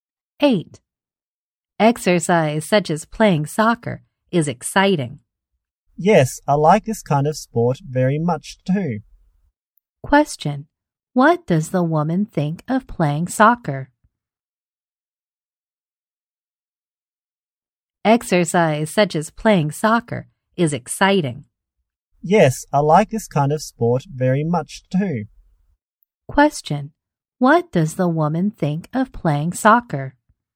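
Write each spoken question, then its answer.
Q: What does the woman think of playing soccer?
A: It's exciting; she likes it very much.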